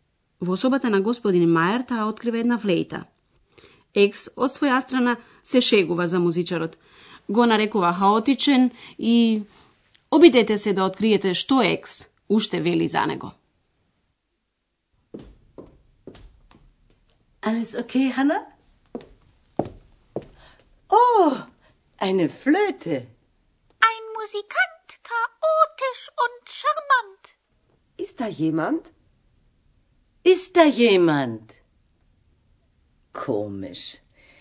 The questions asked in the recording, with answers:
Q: Обидете се да откриете што Екс уште вели за него.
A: Екс го нарекува музичарот уште шармантен, шармант.